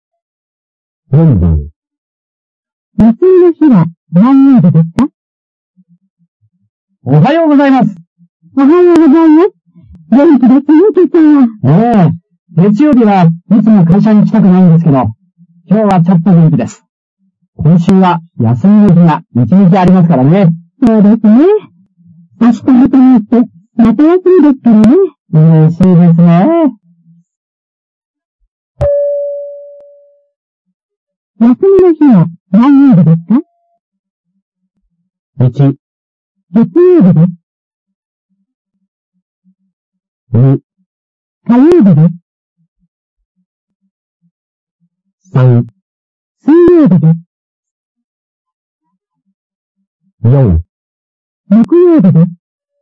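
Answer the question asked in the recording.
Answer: 3: 水曜日です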